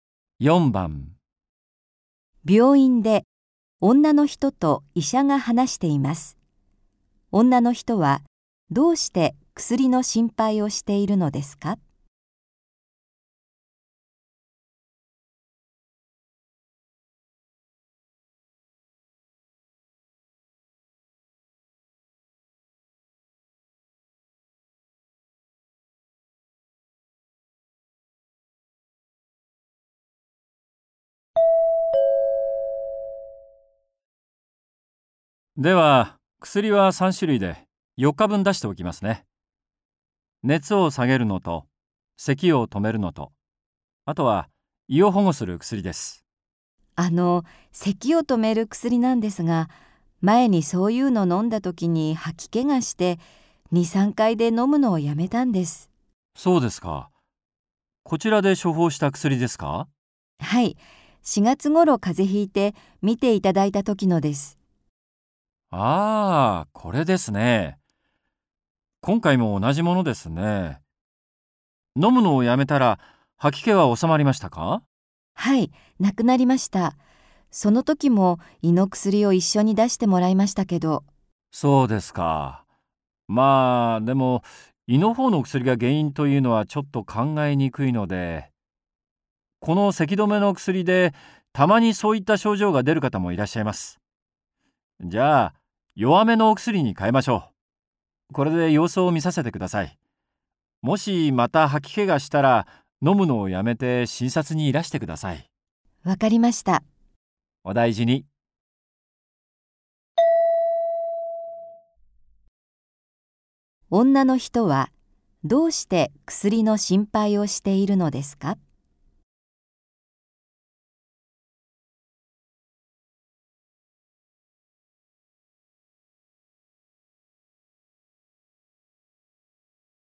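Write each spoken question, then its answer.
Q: 女の人はどうして薬の心配をしているのですか?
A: 前に咳止めの薬を飲んだ時に吐き気がしたから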